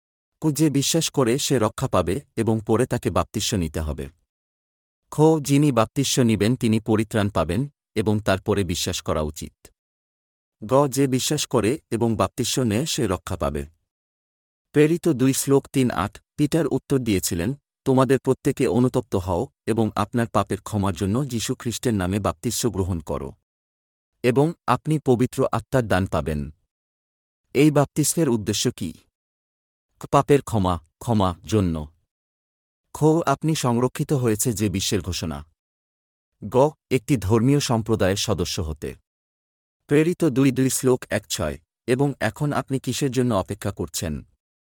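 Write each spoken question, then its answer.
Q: এই বাপ্তিস্মের উদ্দেশ্য কি?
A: ক: পাপের ক্ষমার জন্য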